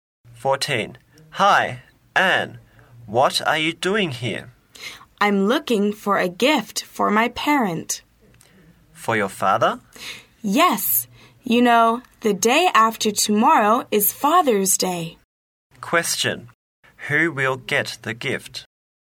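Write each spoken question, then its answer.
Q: Who will get the gift?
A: Anne's father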